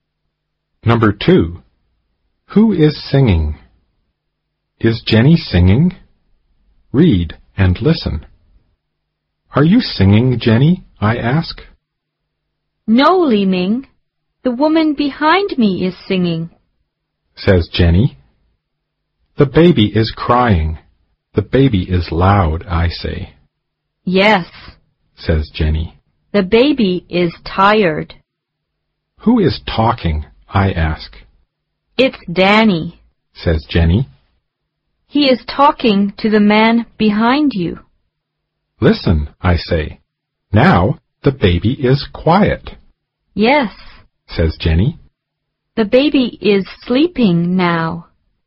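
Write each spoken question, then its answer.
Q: Is Jenny singing?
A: No, the woman behind her is singing.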